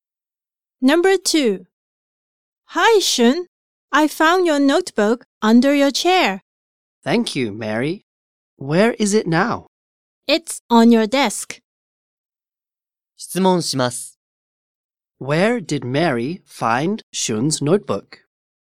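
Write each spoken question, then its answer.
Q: Where did Mary find Shun's notebook?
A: Under his chair.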